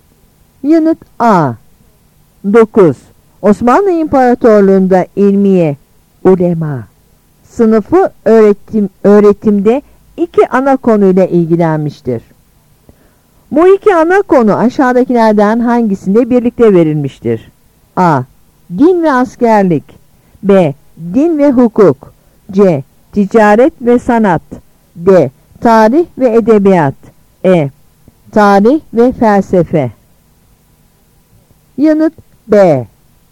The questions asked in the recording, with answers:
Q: Bu iki ana konu aşağıdakilerden hangisinde birlikte verilmiştir?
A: Yanıt B.